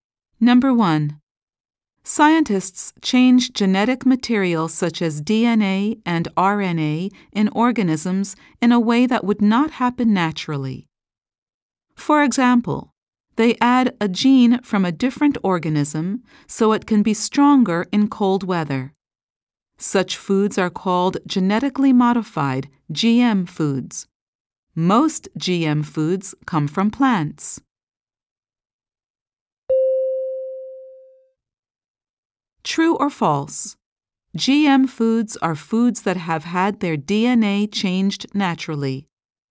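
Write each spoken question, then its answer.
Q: True or false? GM foods are foods that have had their DNA changed naturally.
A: False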